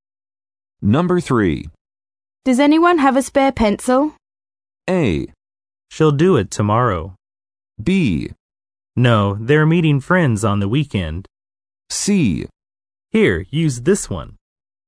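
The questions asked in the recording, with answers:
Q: Does anyone have a spare pencil?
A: C: Here, use this one.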